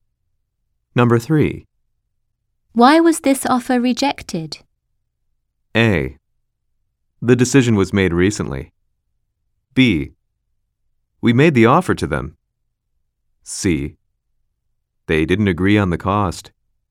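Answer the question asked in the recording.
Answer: C: They didn't agree on the cost.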